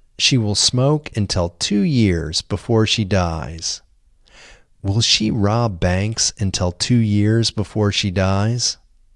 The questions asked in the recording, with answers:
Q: Will she rob banks until 2 years before she dies?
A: No, she won't rob banks until 2 years before she dies.